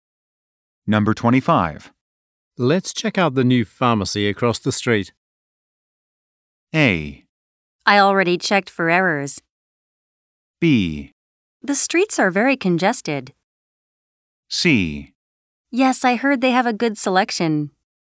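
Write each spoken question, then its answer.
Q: Let's check out the new pharmacy across the street.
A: C: Yes, I heard they have a good selection.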